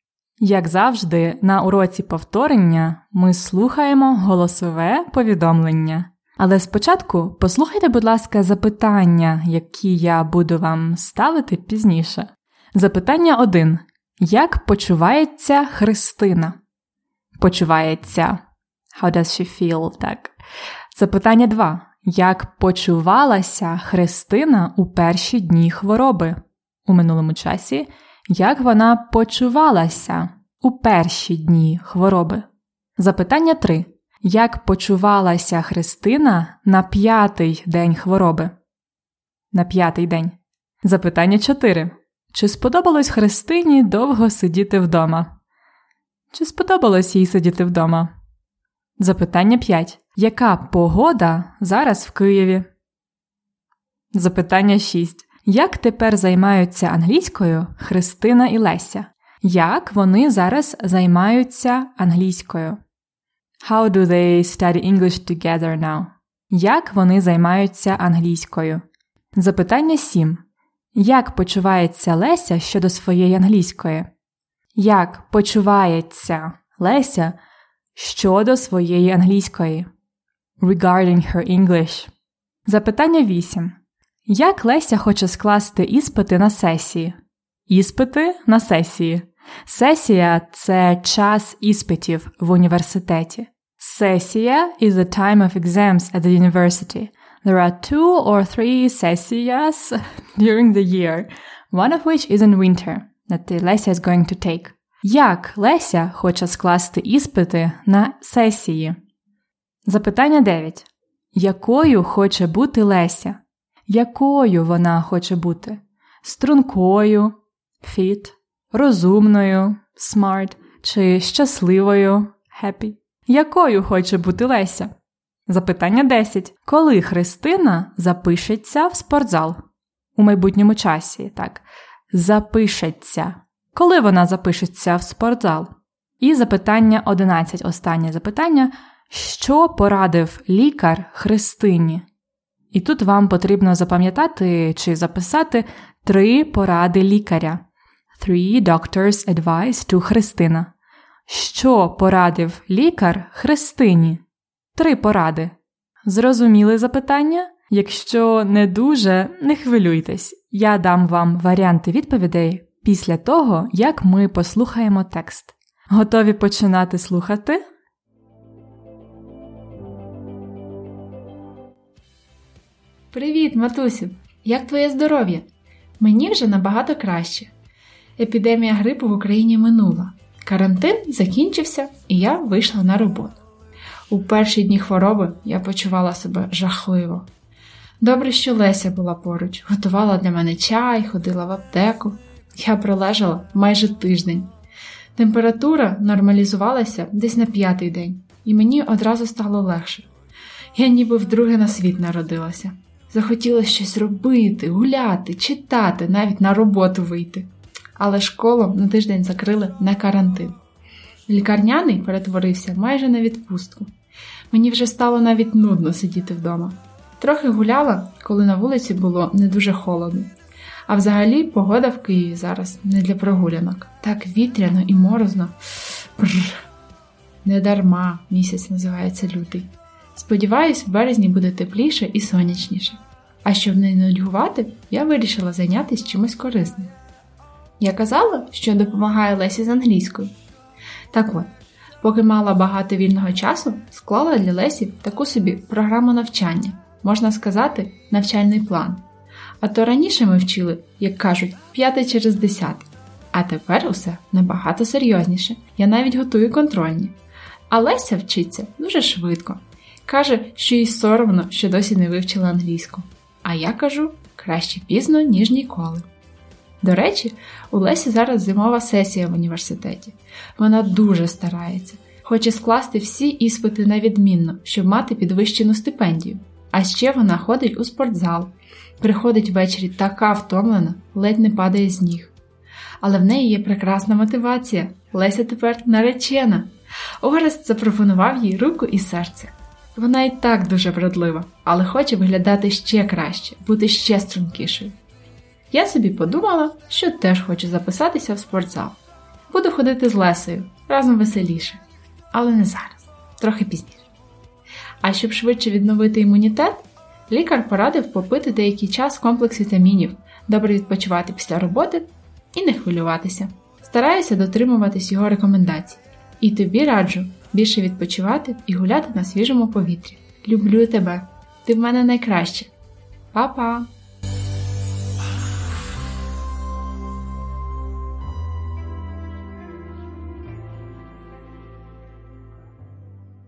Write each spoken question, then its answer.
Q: Як почувається Христина?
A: Вона почувається краще, набагато краще.

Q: Як почувалася Христина у перші дні хвороби?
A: Правильна відповідь жахливо.

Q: Як почувалася Христина на п'ятий день хвороби?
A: На п'ятий день хвороби Христині стало легше.

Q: Чи сподобалось Христині довго сидіти вдома?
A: Ні, не сподобалось, їй було нудно.

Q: Яка погода зараз в Києві?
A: Зараз морозно і вітряно.

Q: Як тепер займаються англійською Христина і Леся?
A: Вони тепер займаються серйозніше.

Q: Як почувається Леся щодо своєї англійської?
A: Їй соромно.

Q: Як Леся хоче скласти іспити на сесії?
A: Вона хоче скласти всі іспити на відмінно.

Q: Якою хоче бути Леся?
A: Бути ще стрункішою.

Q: Коли Христина запишеться в спортзал?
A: Трохи пізніше.